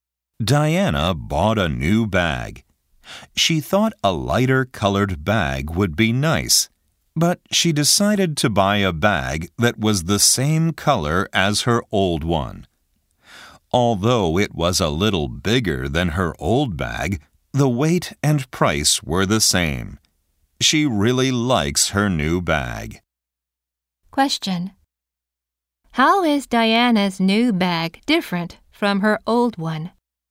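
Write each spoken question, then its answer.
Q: How is Diana's new bag different from her old one?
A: It is bigger.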